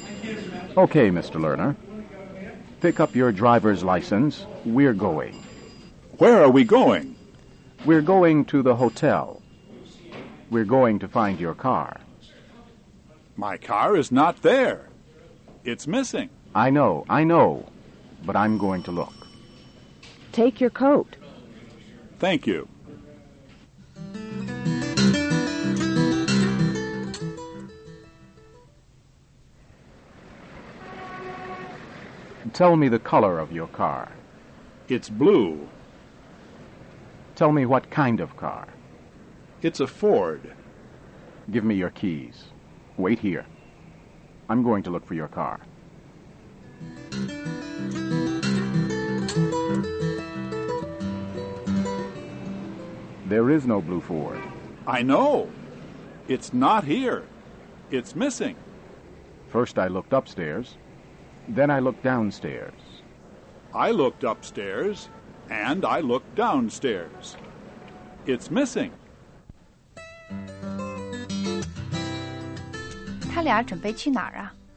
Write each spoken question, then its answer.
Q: 他俩准备去哪儿啊?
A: 他们要去 Martin 住的旅馆。